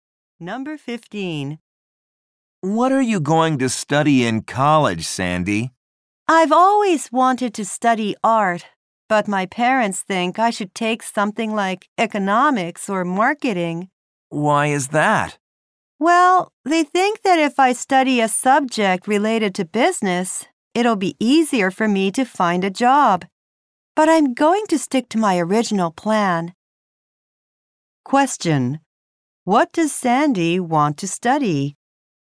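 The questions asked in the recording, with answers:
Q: What does Sandy want to study?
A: Art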